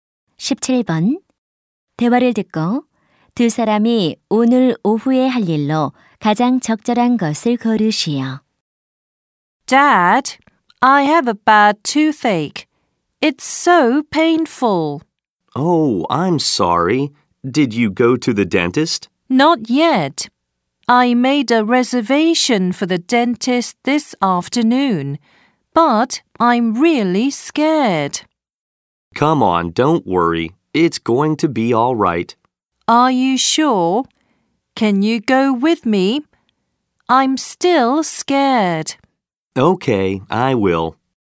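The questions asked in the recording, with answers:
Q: 대화를 듣고 두 사람이 오늘 오후에 할 일로 가장 적절한 것을 고르시오.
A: 치과에 가기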